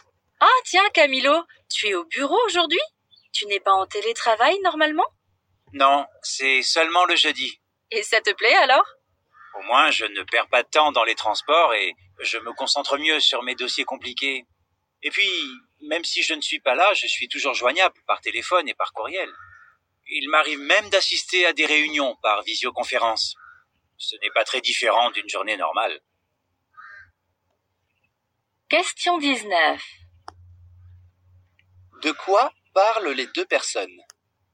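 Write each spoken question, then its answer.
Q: De quoi parlent les deux personnes?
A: Du télétravail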